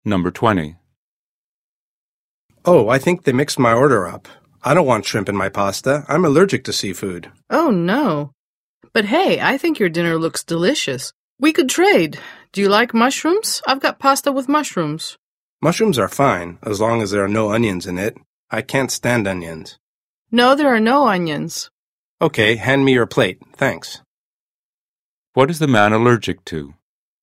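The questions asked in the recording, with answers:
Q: What is the man allergic to?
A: Seafood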